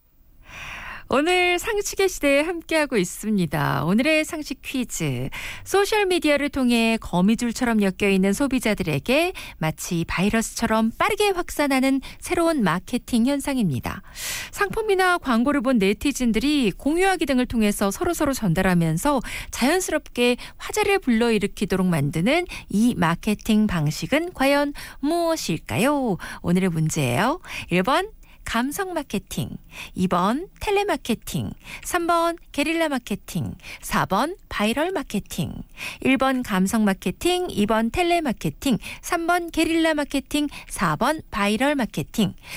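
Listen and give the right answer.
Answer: 4: 바이럴 마케팅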